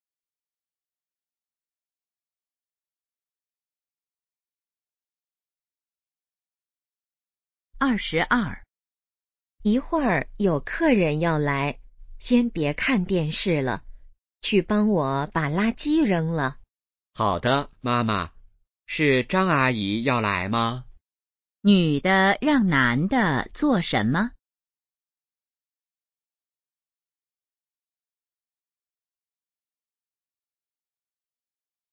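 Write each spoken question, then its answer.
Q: 女的让男的做什么?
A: 扔垃圾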